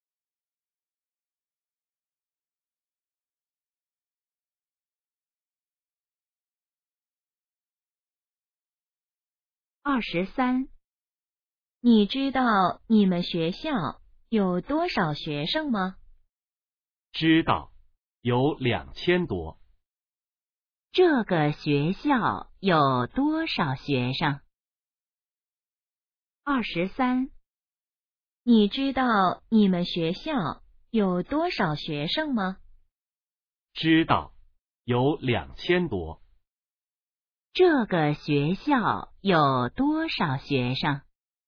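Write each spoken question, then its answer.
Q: 这个学校有多少学生?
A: 两千多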